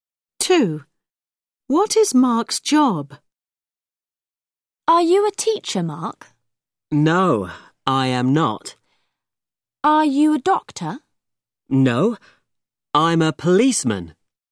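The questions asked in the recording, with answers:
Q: What is Mark's job?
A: a policeman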